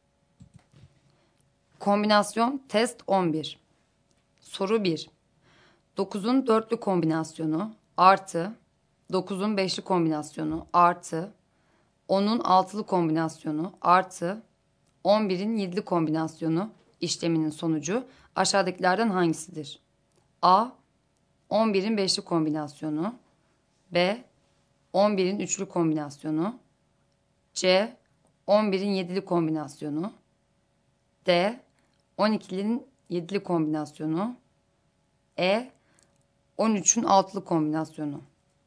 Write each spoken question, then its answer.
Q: 9'un 4'lü kombinasyonu artı 9'un 5'li kombinasyonu artı 10'un 6'lı kombinasyonu artı 11'in 7'li kombinasyonu işleminin sonucu aşağıdakilerden hangisidir?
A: Doğru cevap D şıkkı.